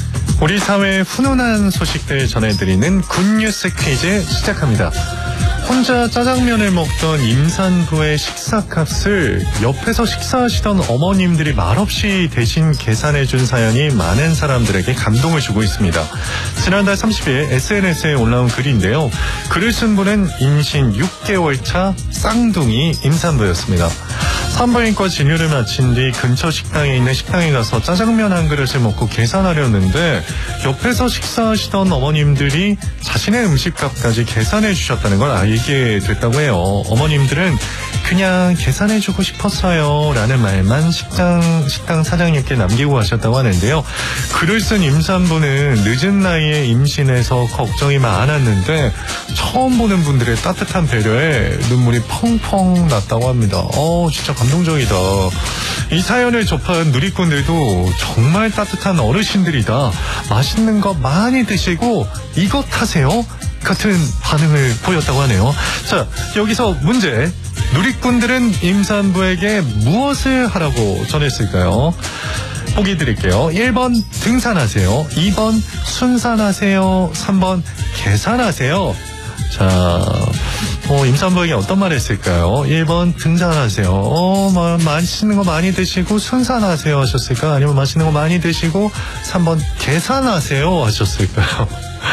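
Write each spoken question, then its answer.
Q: 누리꾼들은 임산부에게 무엇을 하라고 전했을까요?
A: 2: 순산하세요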